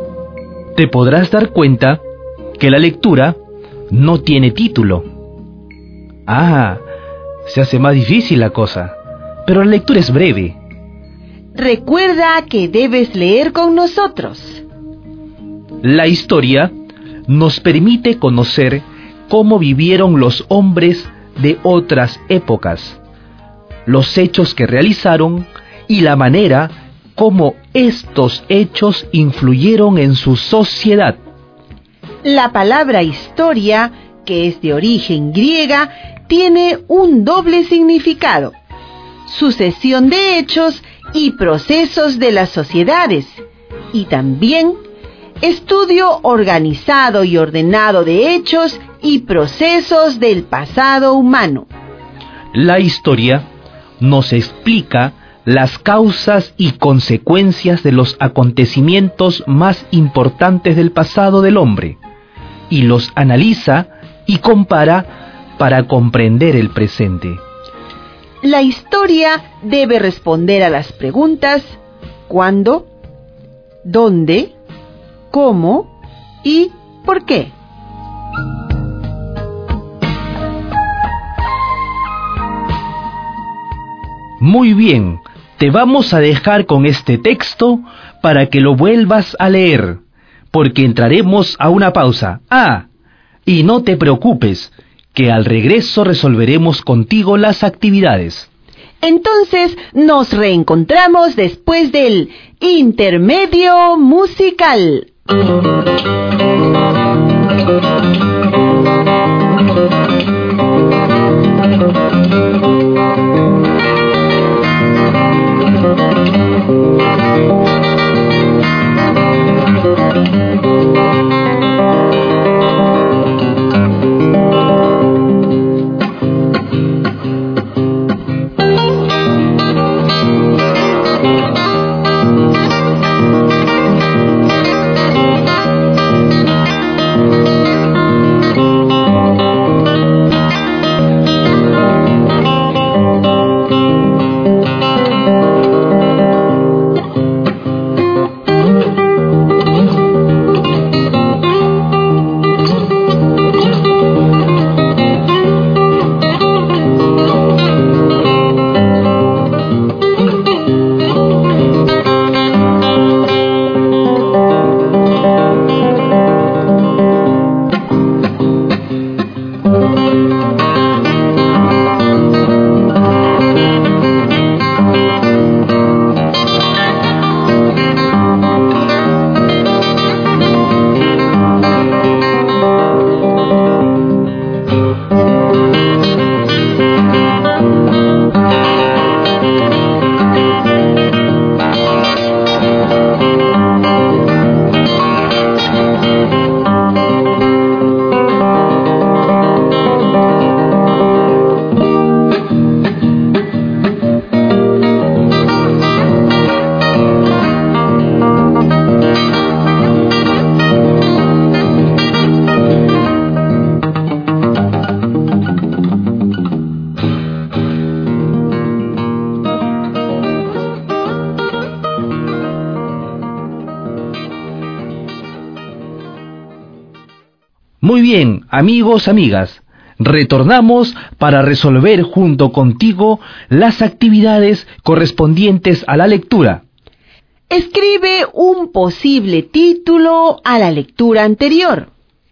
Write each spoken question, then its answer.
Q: Escribe un posible título a la lectura anterior.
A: el título puede ser La historia, como también ¿Qué es la historia?